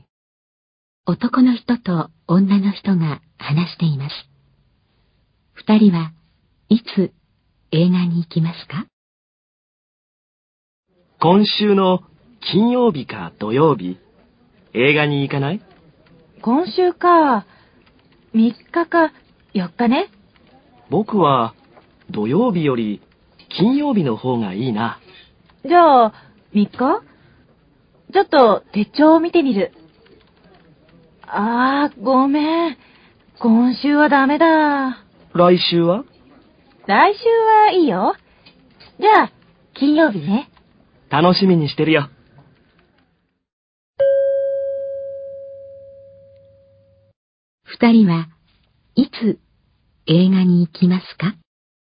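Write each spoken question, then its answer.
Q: 二人はいつ映画に行きますか?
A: 来週の金曜日(10日)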